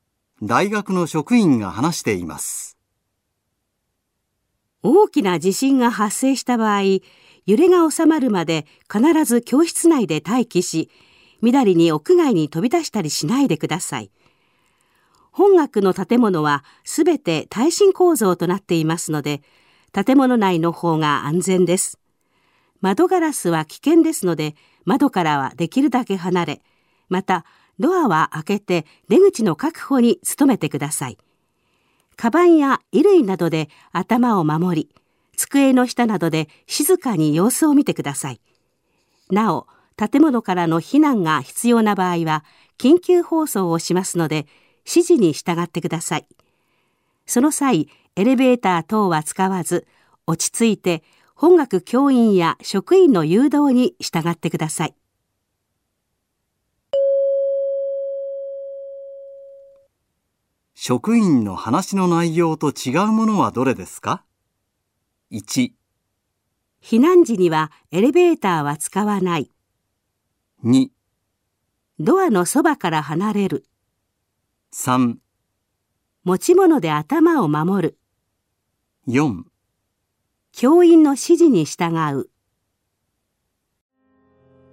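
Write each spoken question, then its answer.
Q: 職員の話の内容と違うものはどれですか?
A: 2: ドアのそばから離れる。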